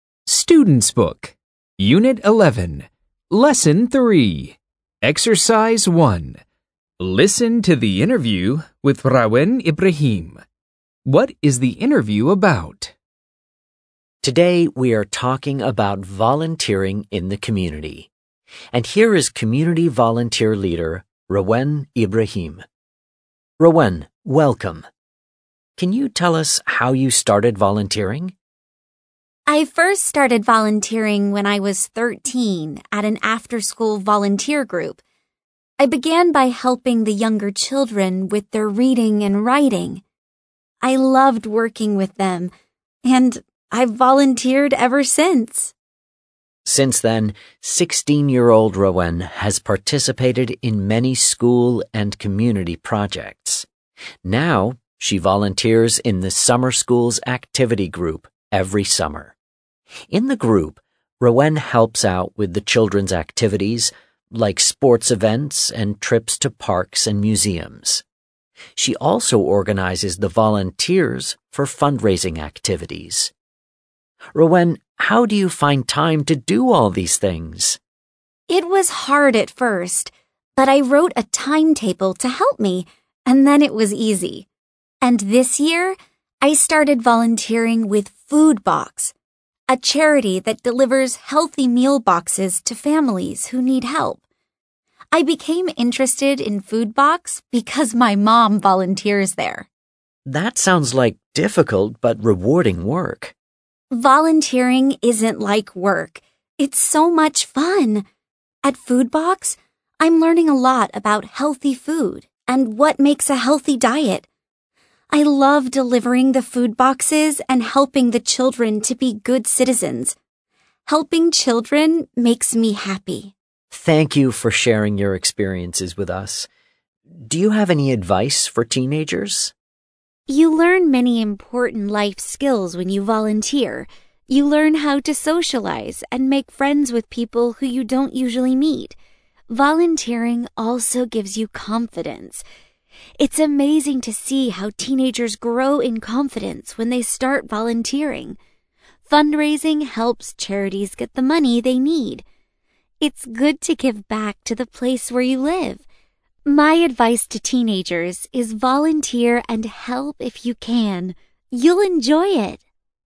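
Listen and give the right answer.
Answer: Volunteering in the community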